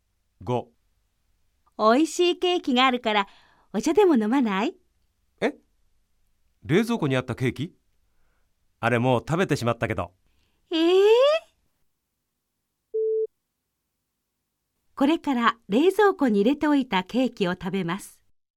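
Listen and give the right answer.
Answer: ×(正しくない)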